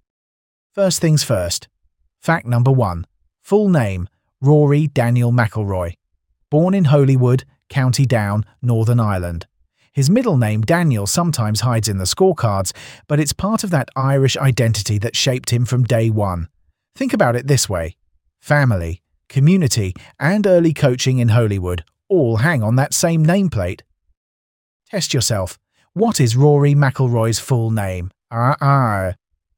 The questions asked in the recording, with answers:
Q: What is Rory McIlroy's full name?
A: Correct answer, Rory Daniel McIlroy.